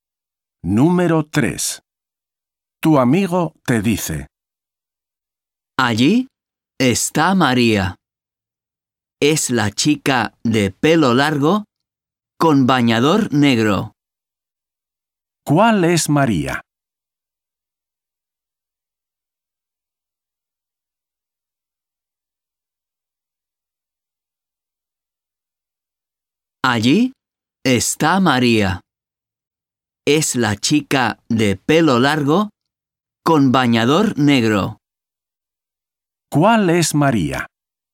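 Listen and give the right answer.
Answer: La chica de pelo largo con bañador negro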